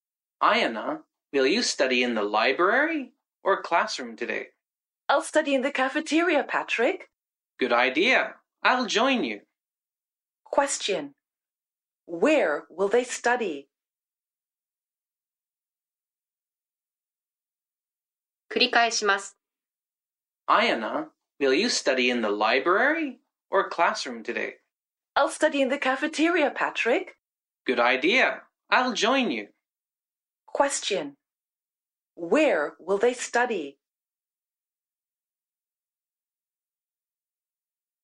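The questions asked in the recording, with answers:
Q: Where will they study?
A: In the cafeteria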